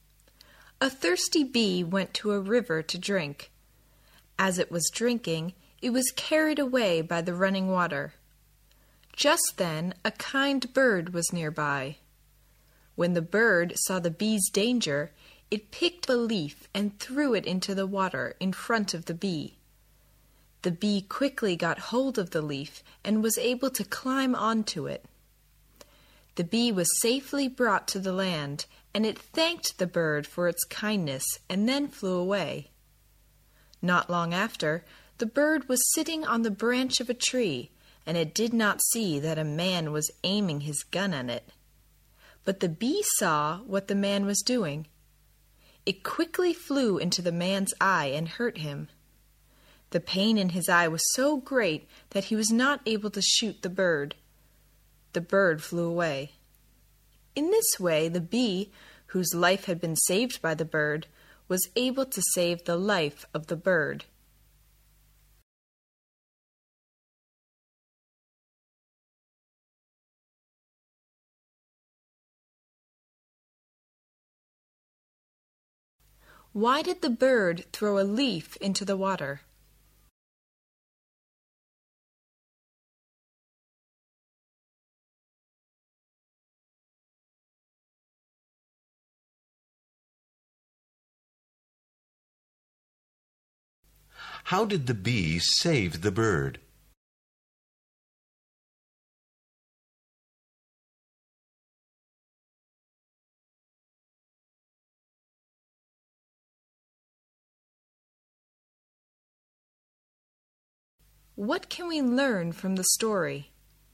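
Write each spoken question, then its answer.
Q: Why did the bird throw a leaf into the water?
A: To save the bee from being carried away by the water

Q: How did the bee save the bird?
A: It flew into the man's eye and hurt him so he couldn't shoot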